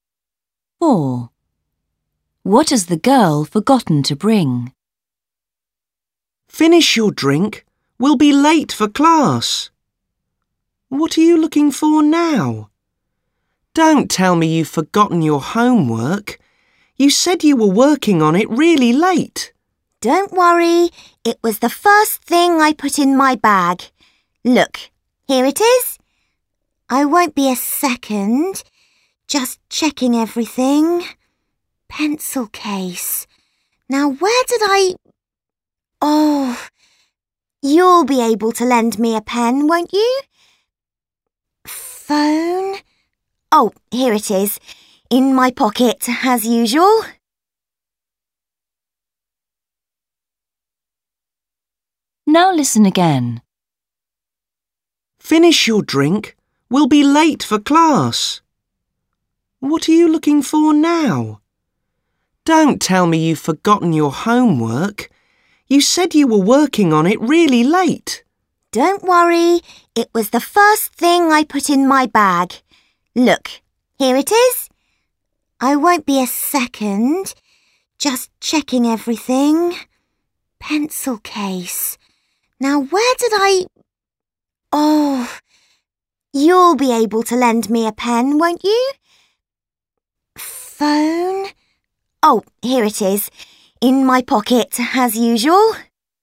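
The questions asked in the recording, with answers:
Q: What has the girl forgotten to bring?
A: a pen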